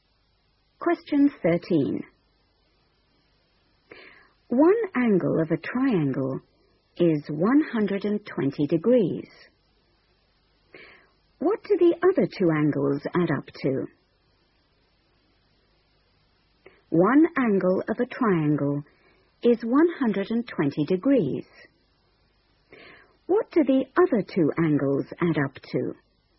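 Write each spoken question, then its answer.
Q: What do the other two angles add up to?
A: 60 degrees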